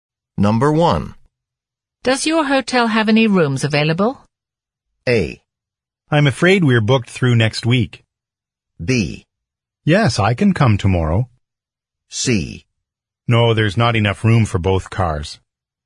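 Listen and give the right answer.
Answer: A: I'm afraid we're booked through next week.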